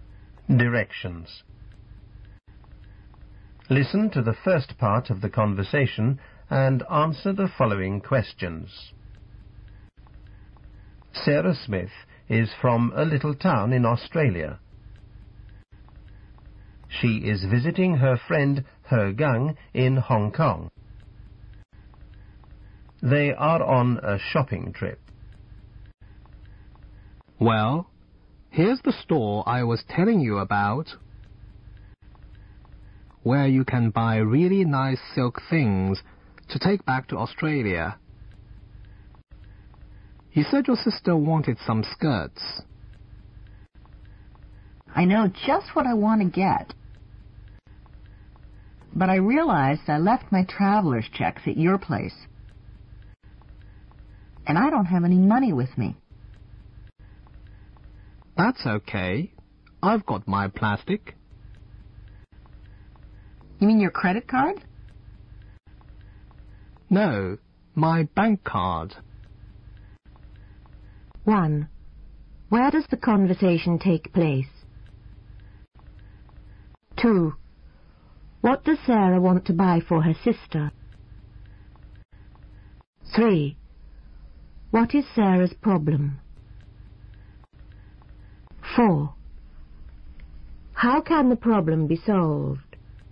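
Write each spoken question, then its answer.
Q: Where does the conversation take place?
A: In a store selling silk things in Hong Kong

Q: What does Sarah want to buy for her sister?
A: Silk skirts

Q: What is Sarah's problem?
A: She left her traveler's checks at He Gang's place and has no money with her

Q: How can the problem be solved?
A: He Gang pays with her bank card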